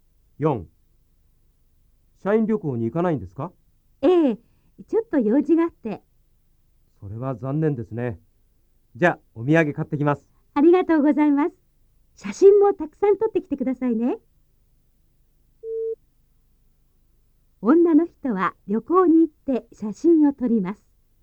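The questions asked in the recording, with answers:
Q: 女の人は旅行に行って写真を撮ります。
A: いいえ、女の人は旅行に行きません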